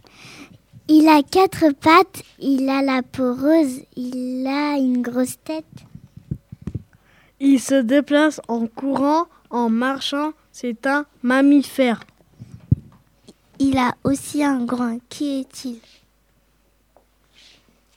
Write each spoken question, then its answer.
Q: Qui est-il?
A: Vous avez trouvé, je suis le cochon.